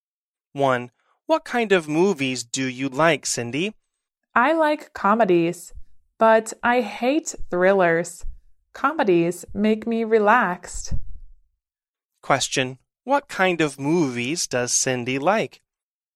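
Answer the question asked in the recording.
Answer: Comedies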